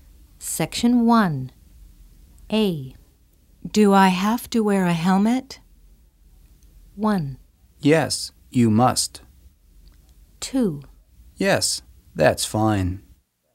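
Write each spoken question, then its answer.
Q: Do I have to wear a helmet?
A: 1: Yes, you must.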